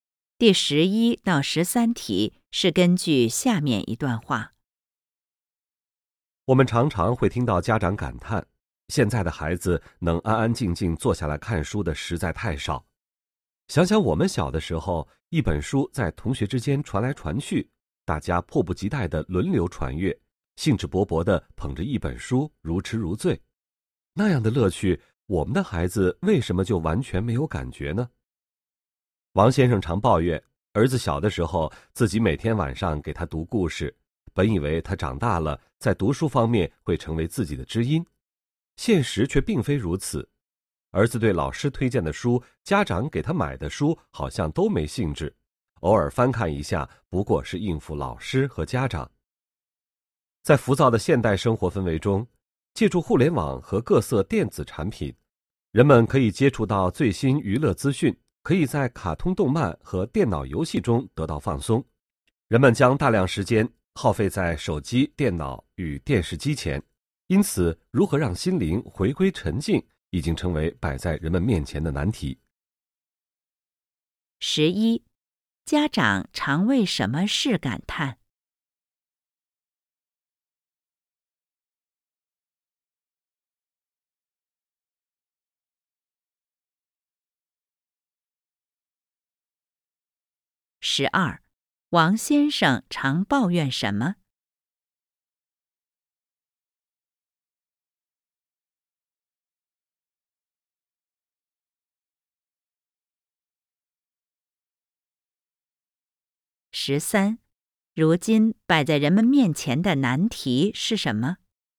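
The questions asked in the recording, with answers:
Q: 家长常为什么事感叹?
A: 现在的孩子能安安静静坐下来看书的太少

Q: 王先生常抱怨什么?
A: 儿子长大后对读书没兴趣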